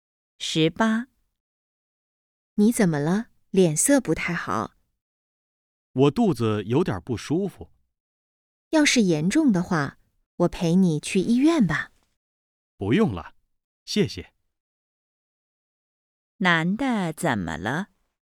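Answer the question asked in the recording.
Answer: 肚子有点不舒服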